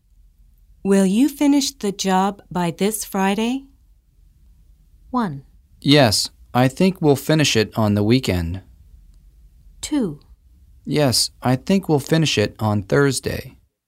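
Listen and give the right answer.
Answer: 2: Yes, I think we'll finish it on Thursday.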